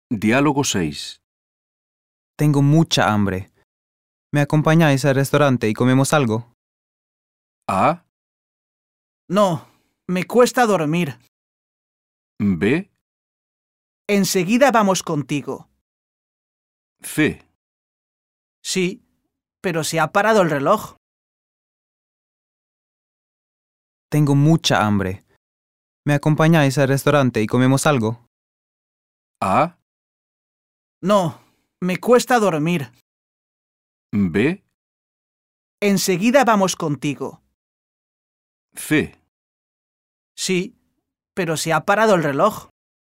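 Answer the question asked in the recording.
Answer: B: Enseguida vamos contigo.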